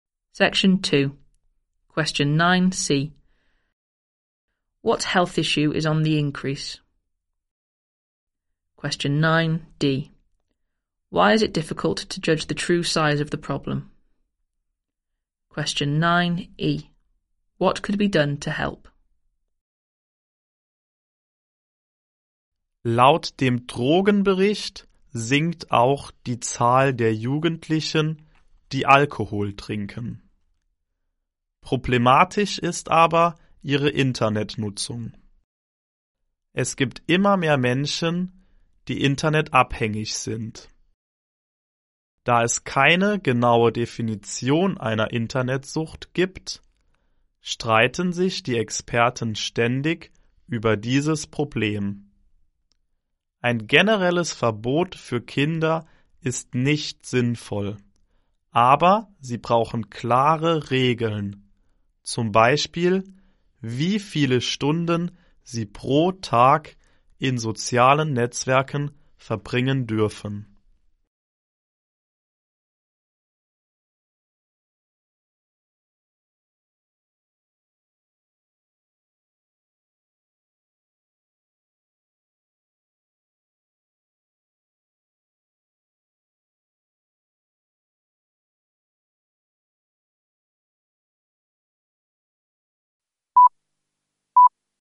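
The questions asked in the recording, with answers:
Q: What health issue is on the increase?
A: Internet addiction

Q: Why is it difficult to judge the true size of the problem?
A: There is no exact definition of internet addiction

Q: What could be done to help?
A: Clear rules for children, e.g. how many hours a day on social networks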